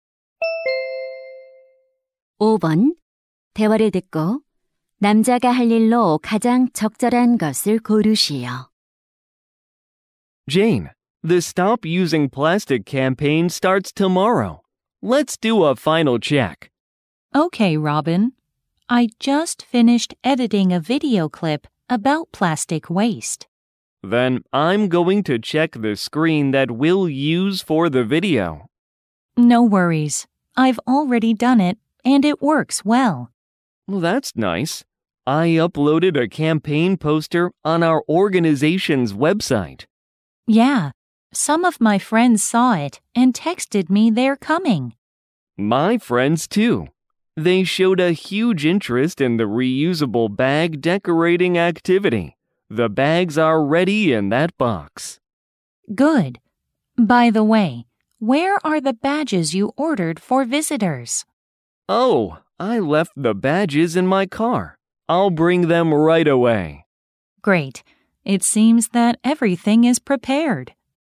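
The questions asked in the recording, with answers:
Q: 대화를 듣고 남자가 할 일로 가장 적절한 것을 고르시오.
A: 차에서 배지 가져오기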